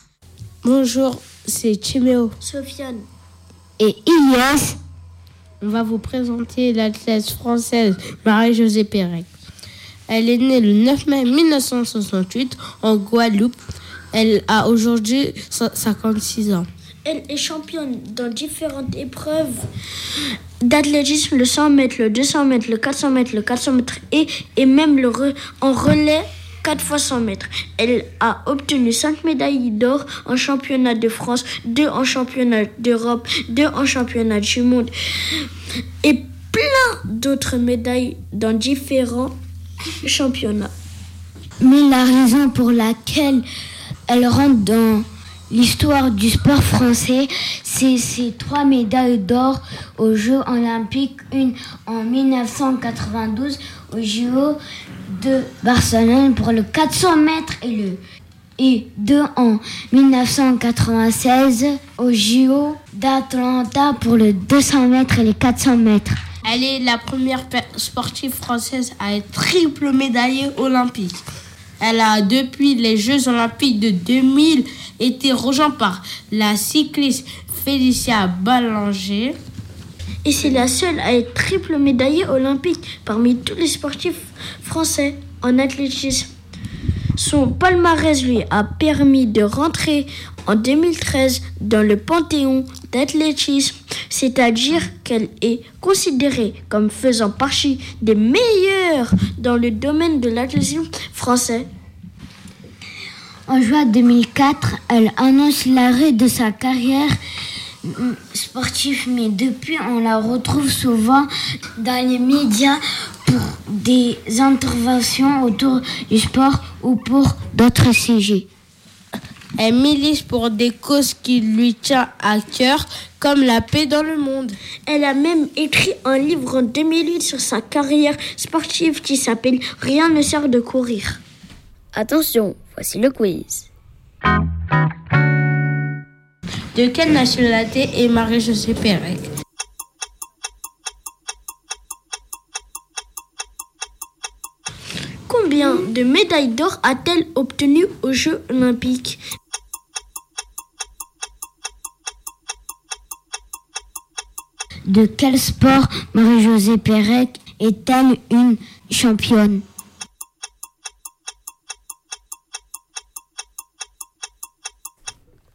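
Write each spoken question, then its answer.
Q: De quelle nationalité est Marie-Josée Pérec?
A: Française

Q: De quel sport Marie-Josée Pérec est-elle une championne?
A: L'athlétisme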